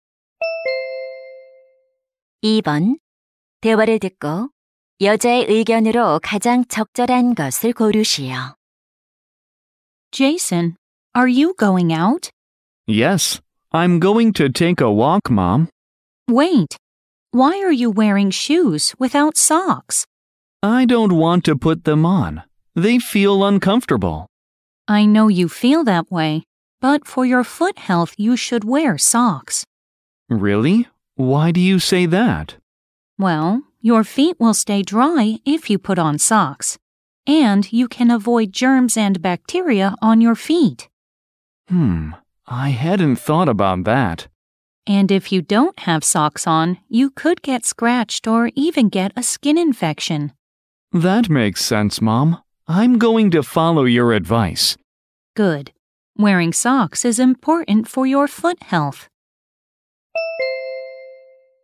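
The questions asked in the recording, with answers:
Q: 대화를 듣고 여자의 의견으로 가장 적절한 것을 고르시오.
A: 발 건강을 위해 양말을 신어야 한다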